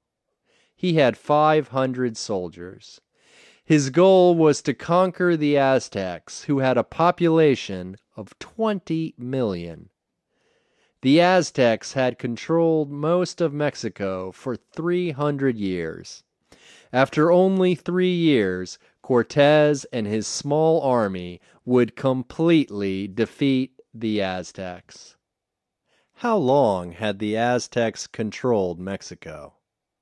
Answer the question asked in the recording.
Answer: They had controlled Mexico for 300 years.